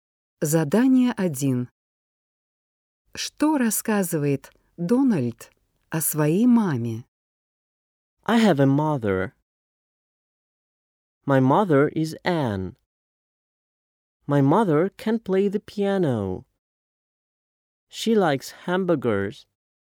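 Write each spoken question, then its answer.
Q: Что рассказывает Дональд о своей маме?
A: Её зовут Энн, она умеет играть на пианино и любит гамбургеры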